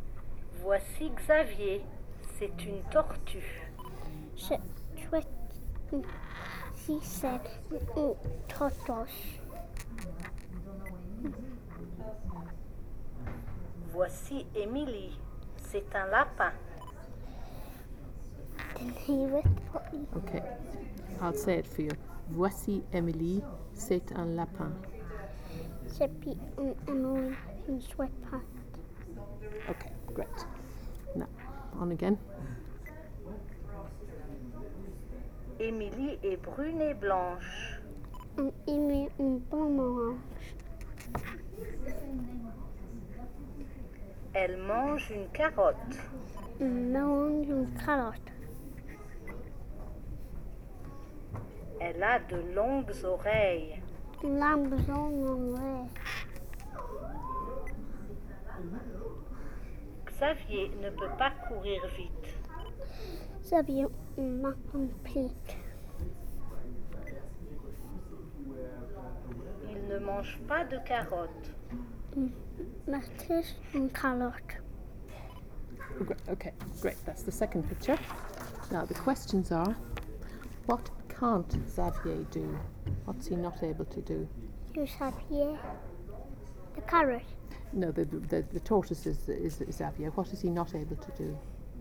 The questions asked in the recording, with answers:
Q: what can't Xavier do?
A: Run.